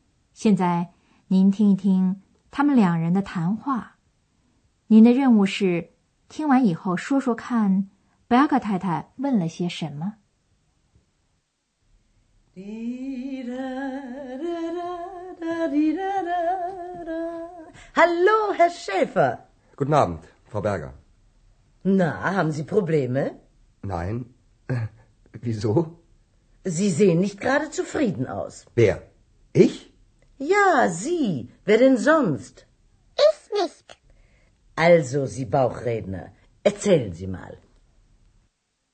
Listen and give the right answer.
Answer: 原来Berger太太问Andreas有没有什么问题。